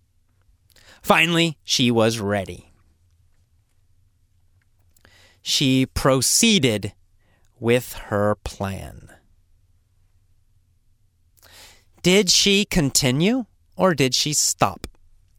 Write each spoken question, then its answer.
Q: Did she continue or did she stop?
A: She continued.